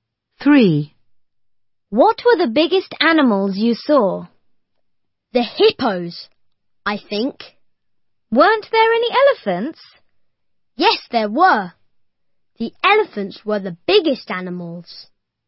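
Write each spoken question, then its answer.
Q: What were the biggest animals you saw?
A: elephants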